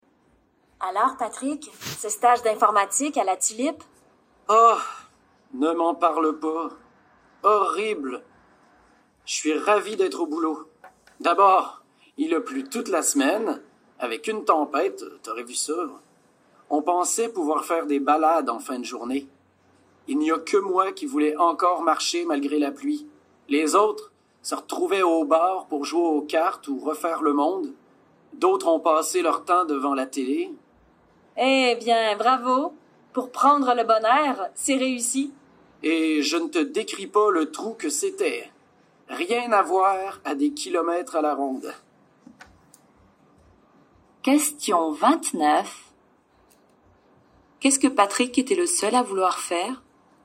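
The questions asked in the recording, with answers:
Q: Qu'est-ce que Patrick était le seul à vouloir faire?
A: Marcher (se promener) malgré la pluie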